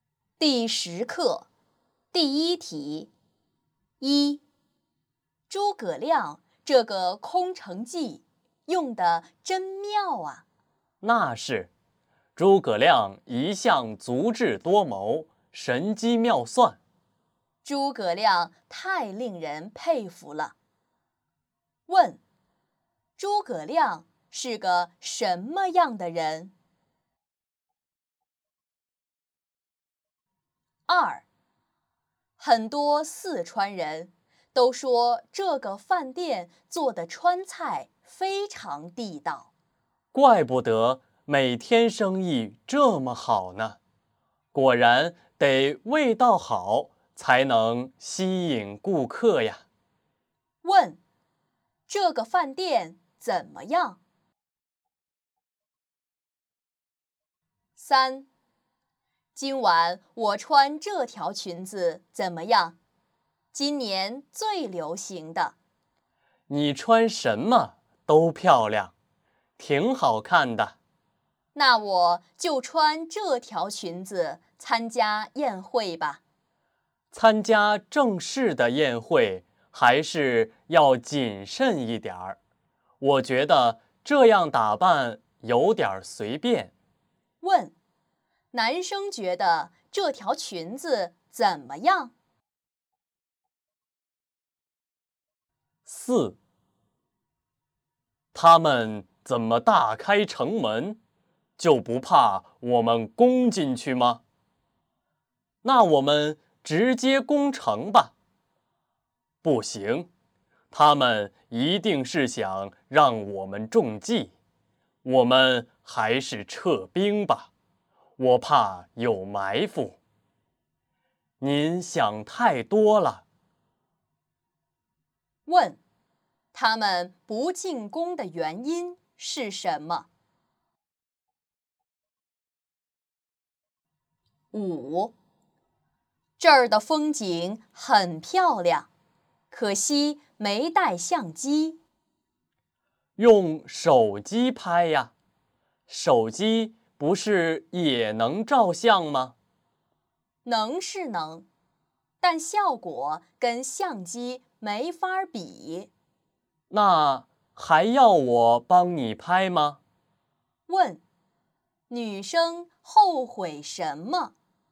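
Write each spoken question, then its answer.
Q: 问,诸葛亮是个什么样的人?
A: 足智多谋,神机妙算

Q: 问,这个饭店怎么样?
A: 川菜很地道,生意很好

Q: 问,男生觉得这条裙子怎么样?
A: 太随便,不适合正式宴会

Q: 问,他们不进攻的原因是什么?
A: 怕有埋伏

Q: 问,女生后悔什么?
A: 没带相机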